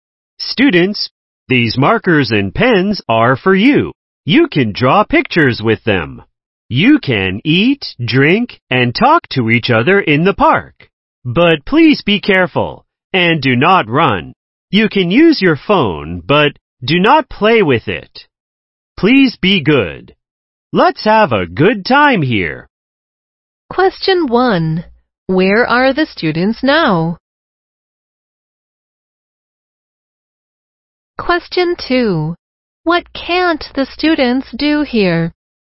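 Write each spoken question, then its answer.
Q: Where are the students now?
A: In the park

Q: What can't the students do here?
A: Run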